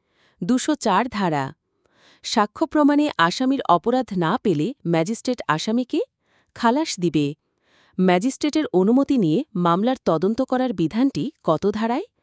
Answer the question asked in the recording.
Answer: ১৫৫ ধারায়।